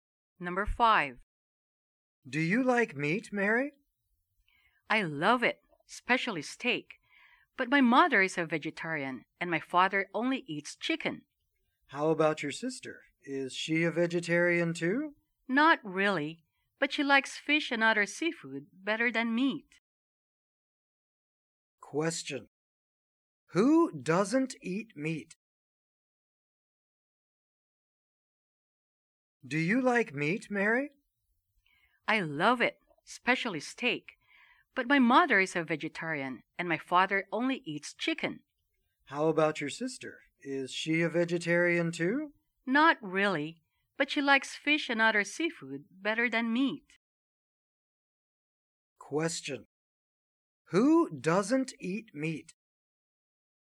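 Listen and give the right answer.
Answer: Mary's mother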